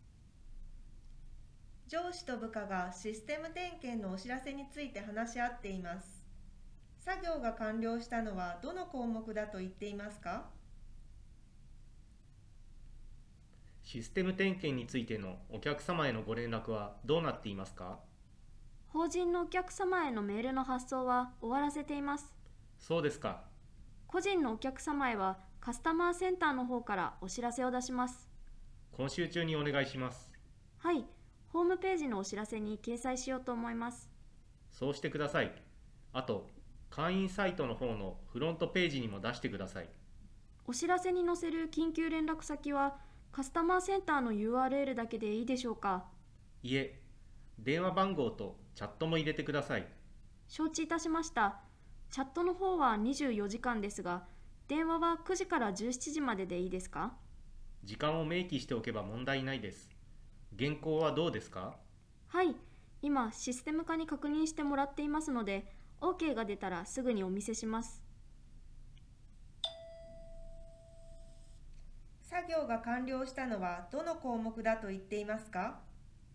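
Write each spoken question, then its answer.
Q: 作業が完了したのはどの項目だと言っていますか?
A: 法人のお客様へのメールの発送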